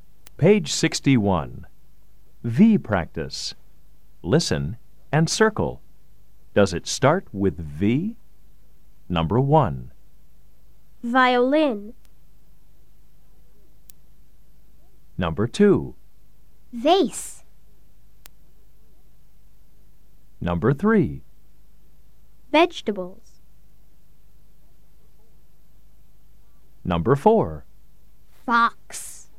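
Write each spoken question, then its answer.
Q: Does it start with V?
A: Yes (violin)

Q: Does it start with V?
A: Yes (vase)

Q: Does it start with V?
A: Yes (vegetables)

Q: Does it start with V?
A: No (fox)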